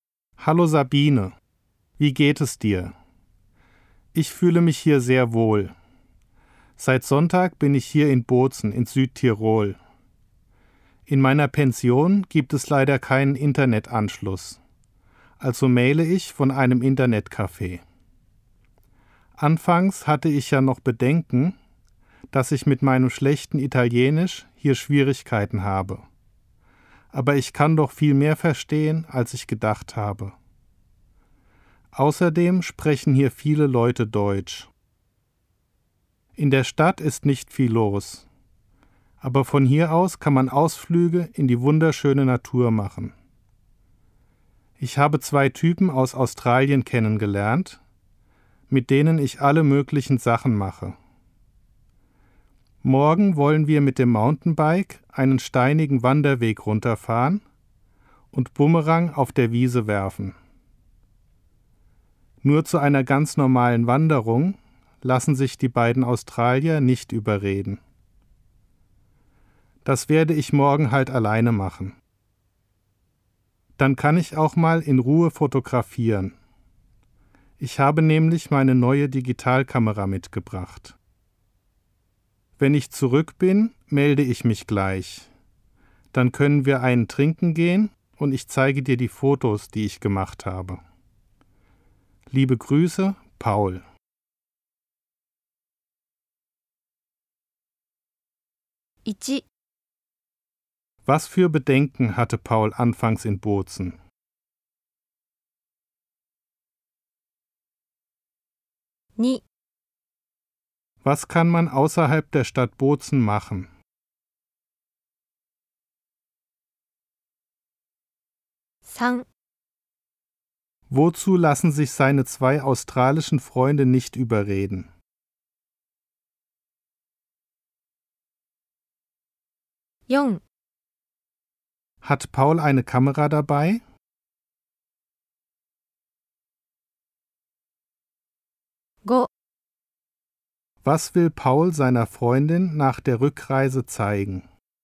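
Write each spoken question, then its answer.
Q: Was für Bedenken hatte Paul anfangs in Bozen?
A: Dass er mit seinem schlechten Italienisch Schwierigkeiten hat

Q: Was kann man außerhalb der Stadt Bozen machen?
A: Ausflüge in die wunderschöne Natur machen

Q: Wozu lassen sich seine zwei australischen Freunde nicht überreden?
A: Zu einer ganz normalen Wanderung

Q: Hat Paul eine Kamera dabei?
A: Ja, seine neue Digitalkamera

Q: Was will Paul seiner Freundin nach der Rückreise zeigen?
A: Die Fotos, die er gemacht hat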